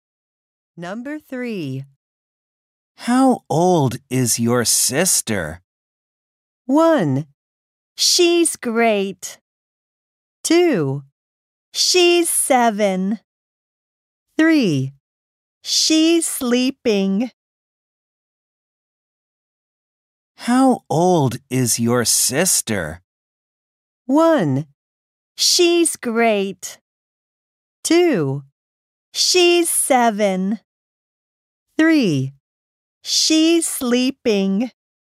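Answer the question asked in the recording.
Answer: 2: She's 7.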